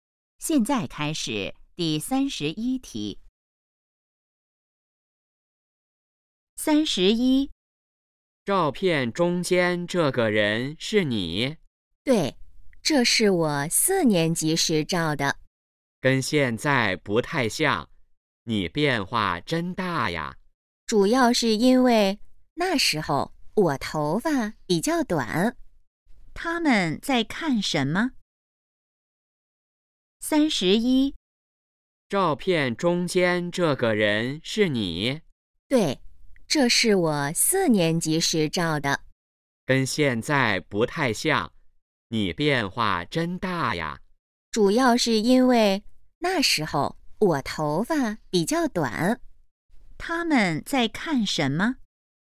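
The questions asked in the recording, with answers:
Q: 他们在看什么?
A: 照片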